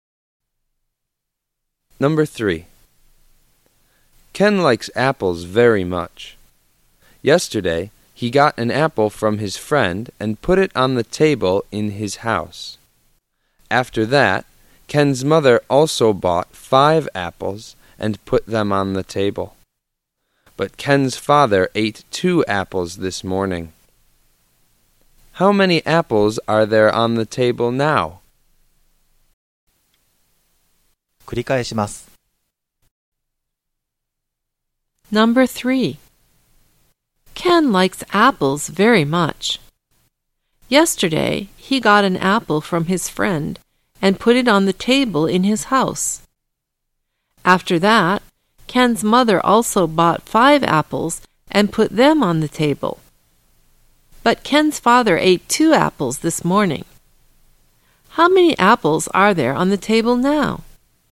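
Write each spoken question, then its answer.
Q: How many apples are there on the table now?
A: Four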